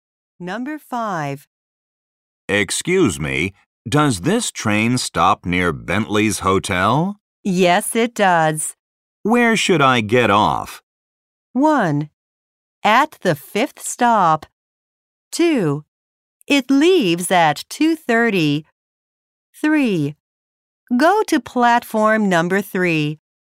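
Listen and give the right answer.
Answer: 1: At the 5th stop.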